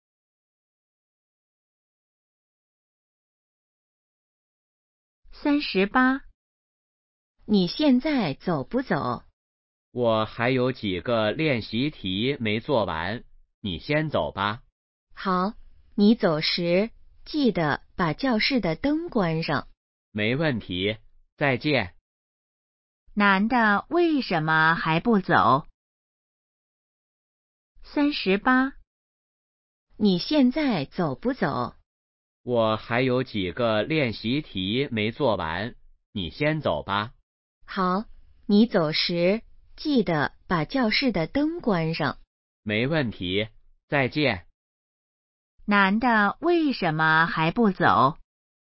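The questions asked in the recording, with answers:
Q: 男的为什么还不走?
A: 练习题还没做完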